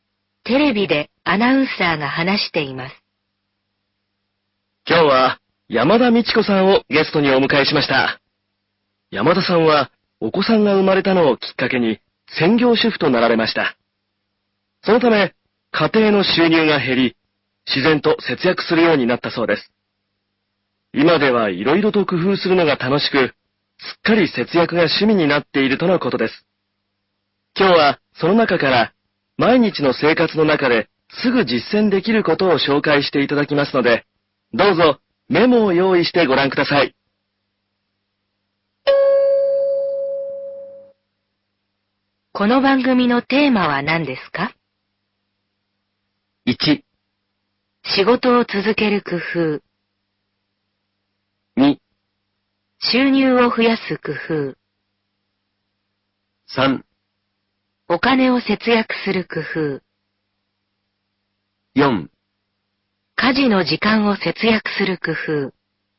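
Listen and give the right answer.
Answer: 3: お金を節約する工夫。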